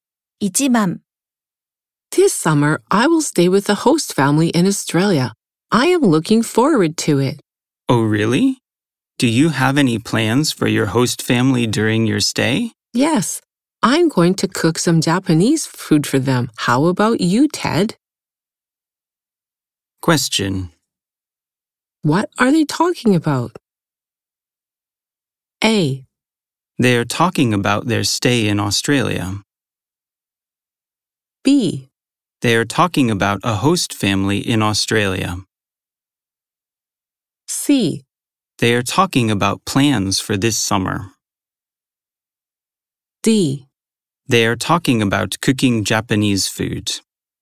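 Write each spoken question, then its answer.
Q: What are they talking about?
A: C: They are talking about plans for this summer.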